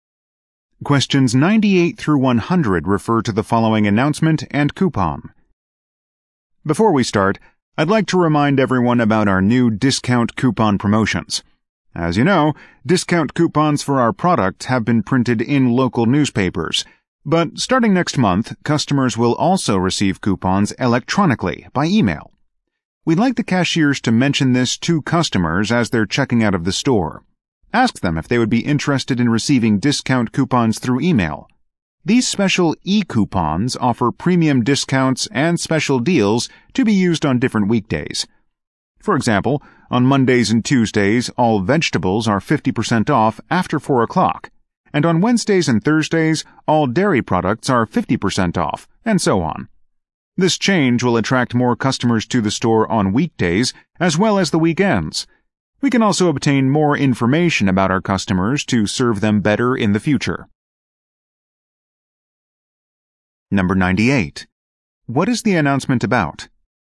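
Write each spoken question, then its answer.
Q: What is the announcement about?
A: A new email discount coupon promotion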